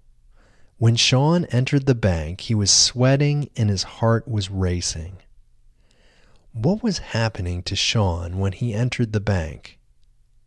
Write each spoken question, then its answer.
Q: What was happening to Sean when he entered the bank?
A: Sean was sweating and his heart was racing when he entered the bank.